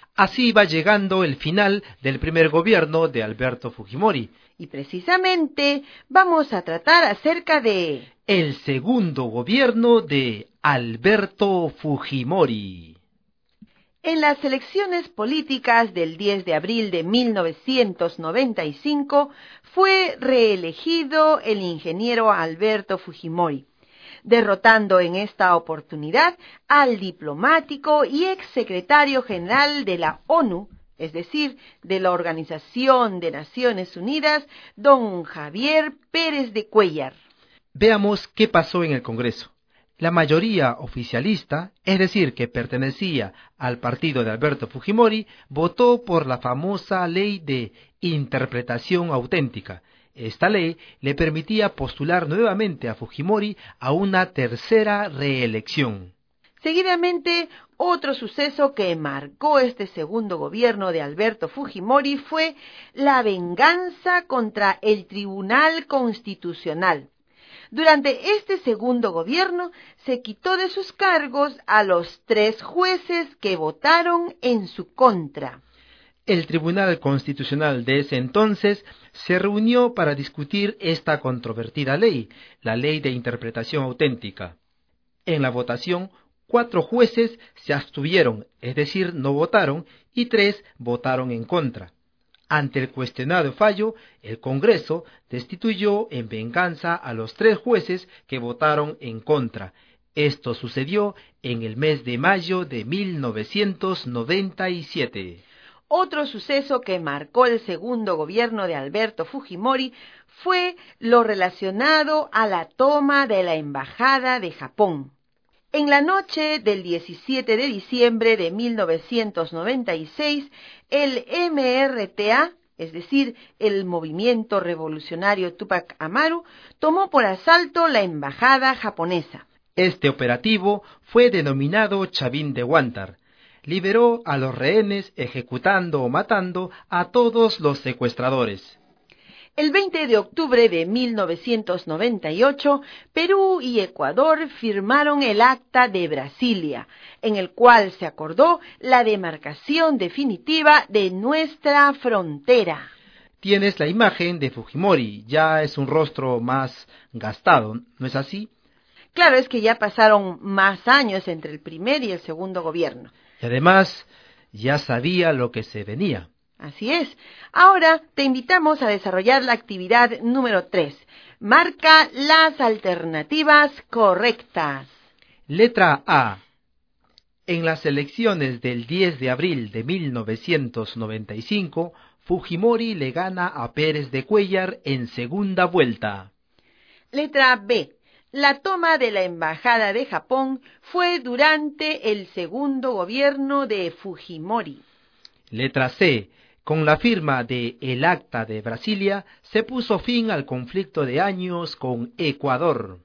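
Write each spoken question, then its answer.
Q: Letra B. La toma de la Embajada de Japón fue durante el segundo gobierno de Fujimori.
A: Correcta

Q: Letra C. Con la firma de El Acta de Brasilia, se puso fin al conflicto de años con Ecuador.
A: Correcta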